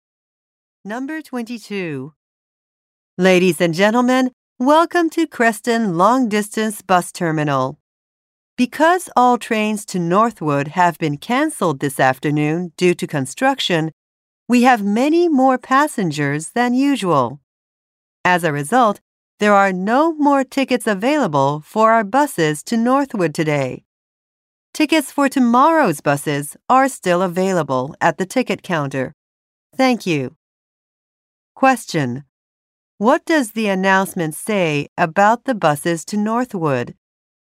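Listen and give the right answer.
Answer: There are no more tickets for today.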